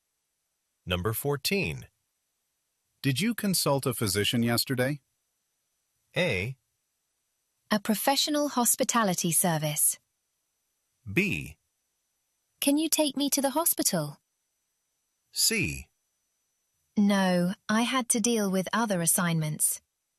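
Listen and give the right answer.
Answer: C: No, I had to deal with other assignments.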